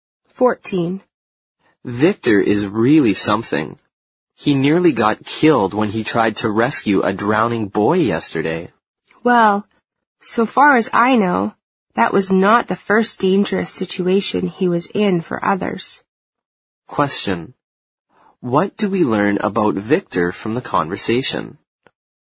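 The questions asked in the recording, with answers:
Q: What do we learn about Victor from the conversation?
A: He has put himself in danger to help others more than once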